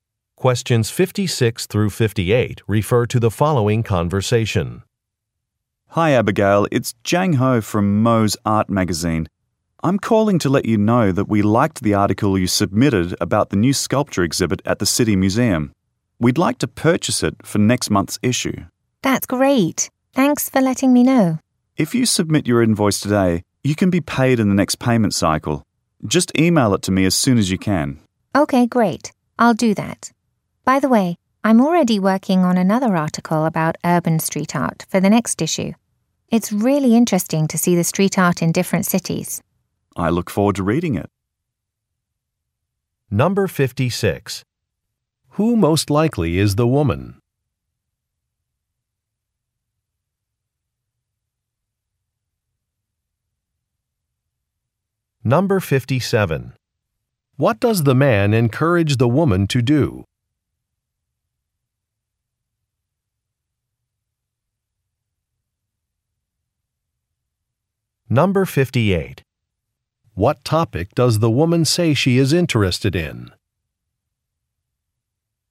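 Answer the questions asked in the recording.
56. A writer
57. Submit her invoice today
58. Urban street art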